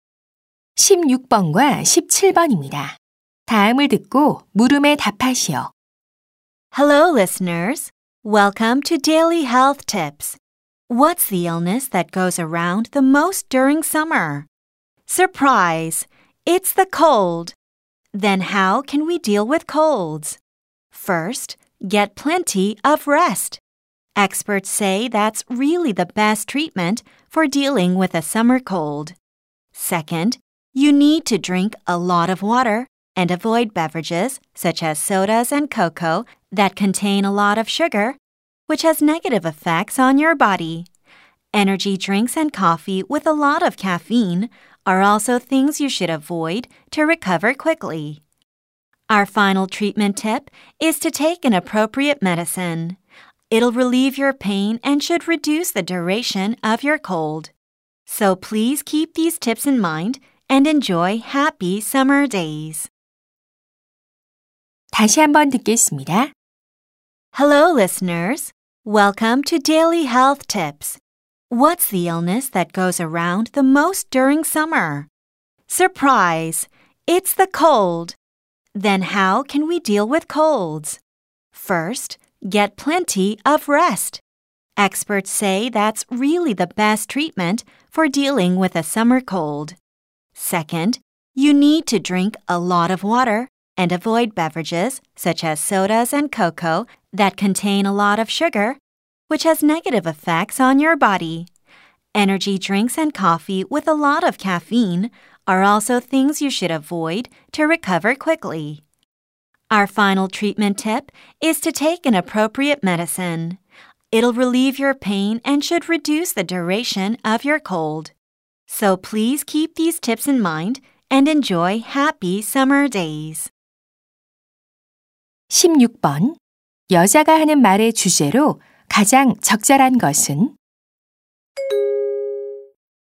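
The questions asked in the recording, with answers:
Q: 여자가 하는 말의 주제로 가장 적절한 것은?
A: 여름 감기를 치료하는 방법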